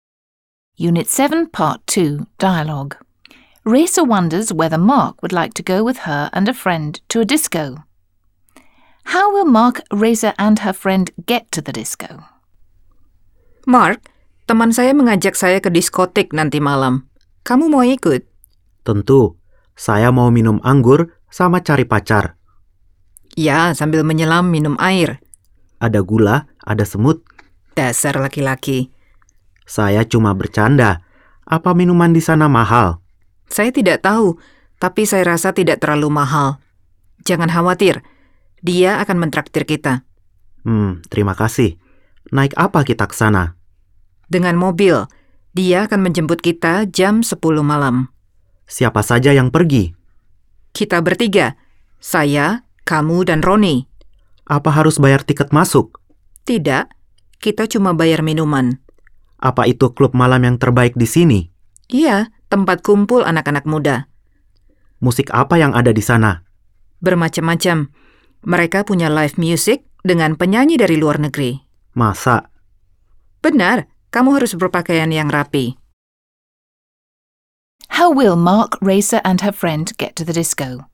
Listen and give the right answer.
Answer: By car.